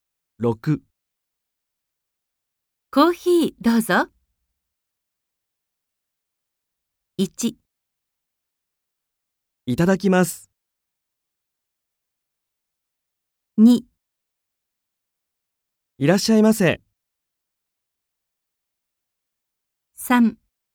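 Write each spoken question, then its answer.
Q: コーヒーどうぞ。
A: 1: いただきます。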